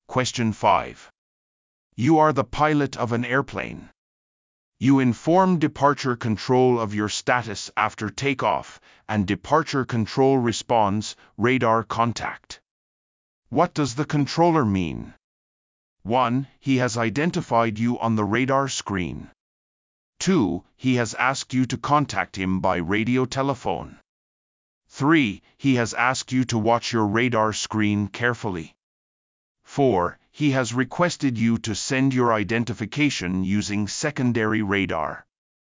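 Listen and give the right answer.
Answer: 1: He has identified you on the radar screen.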